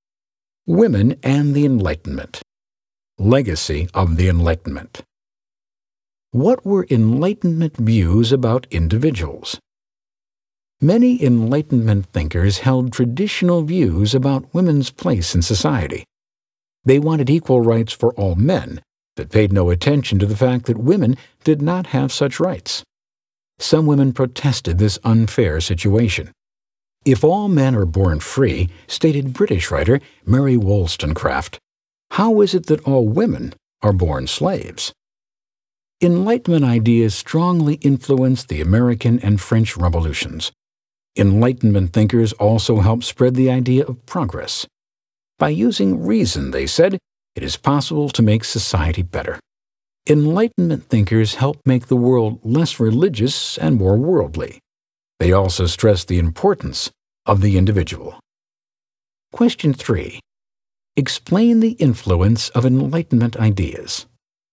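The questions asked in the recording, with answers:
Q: Explain the influence of Enlightenment ideas.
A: They strongly influenced the American and French revolutions, spread the idea of progress, made the world less religious and more worldly, and stressed the importance of the individual.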